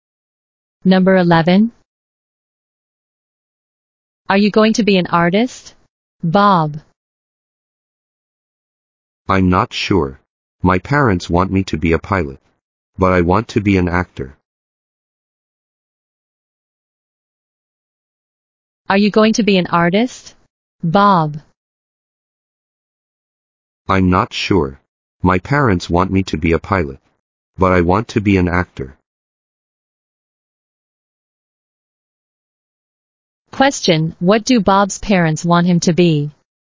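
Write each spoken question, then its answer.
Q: Question, what do Bob's parents want him to be?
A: A pilot.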